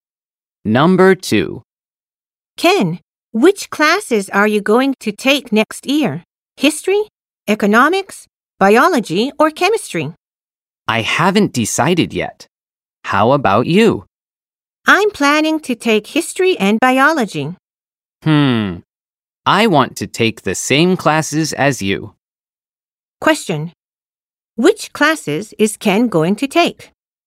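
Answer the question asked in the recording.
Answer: History and biology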